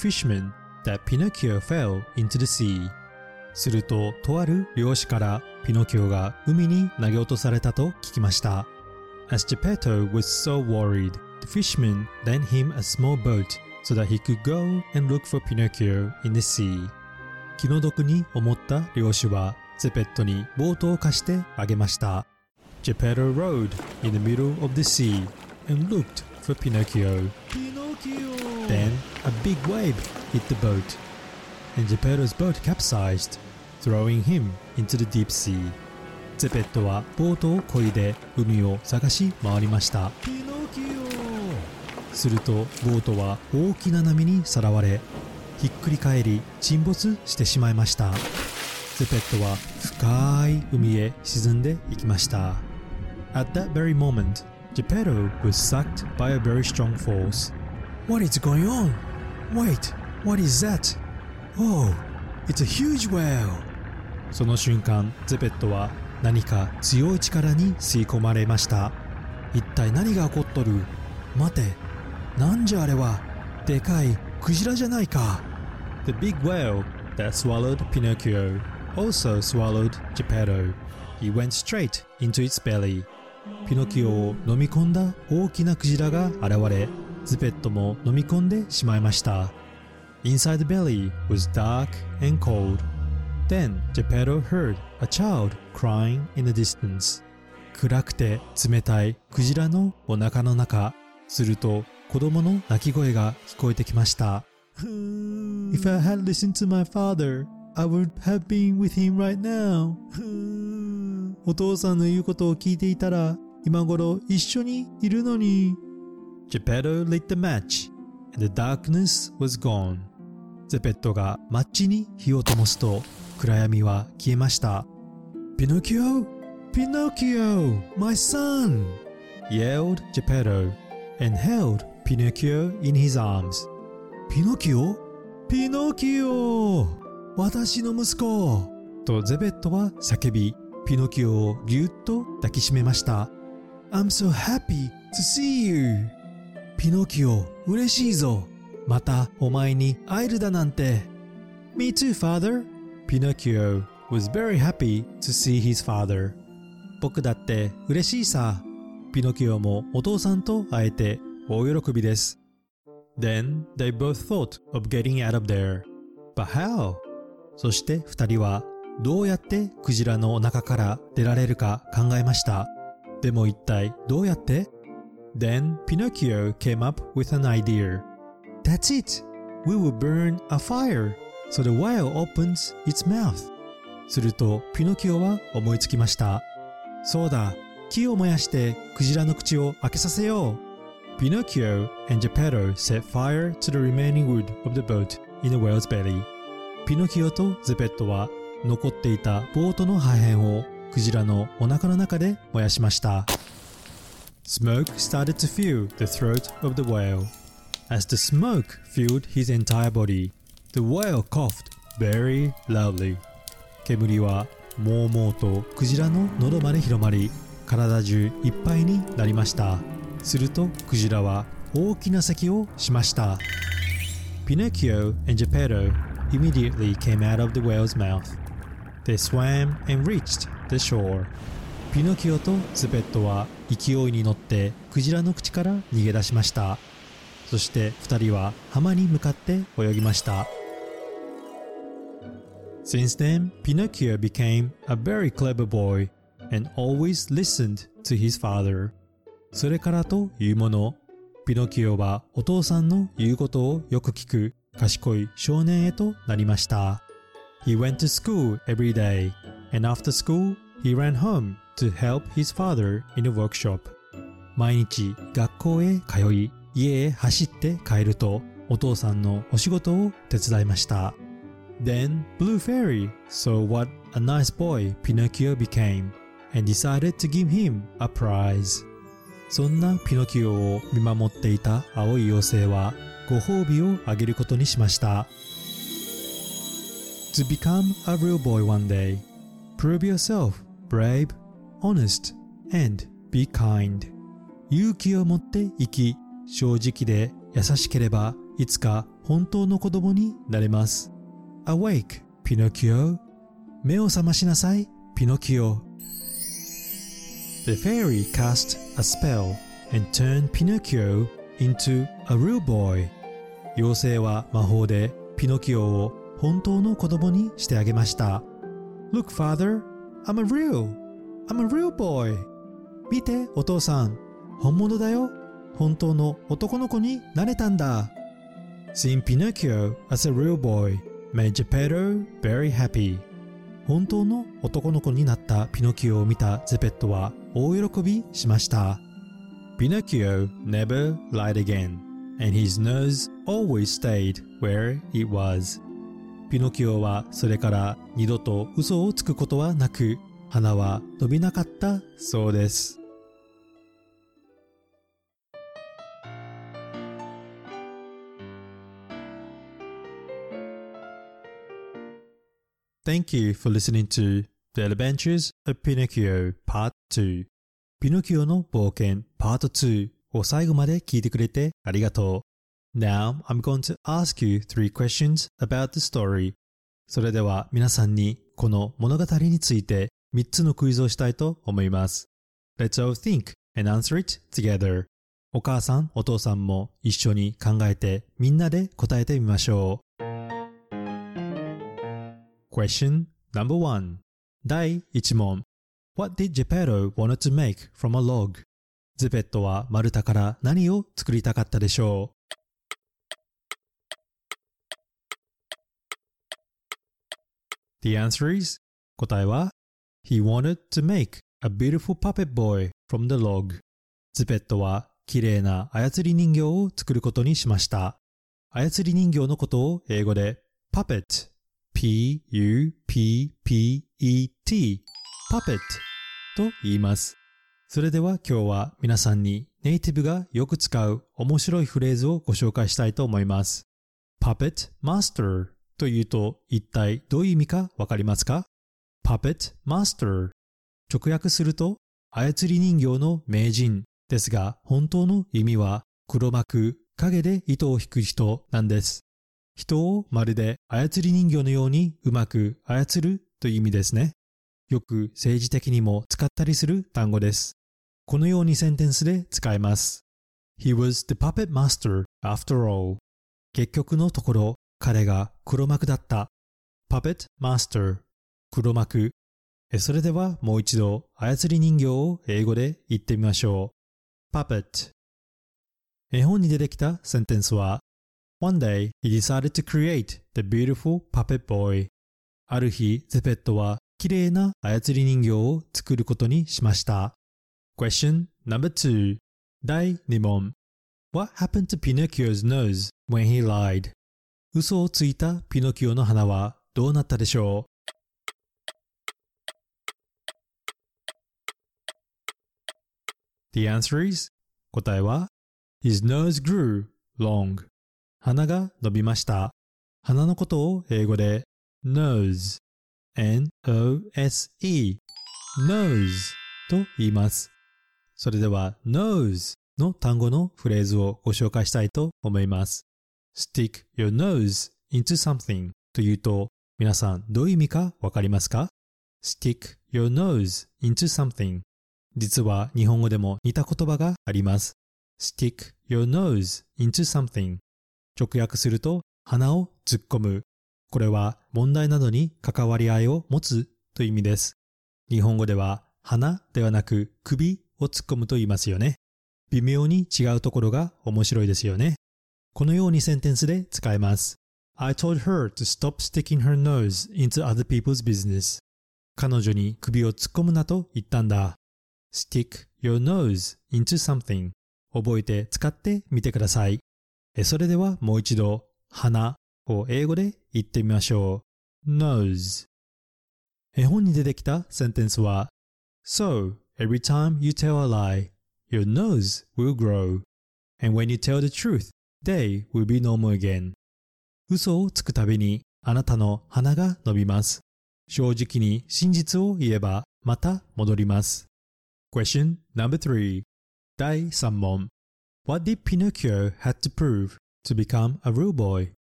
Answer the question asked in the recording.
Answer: He had to prove himself brave, honest, and be kind.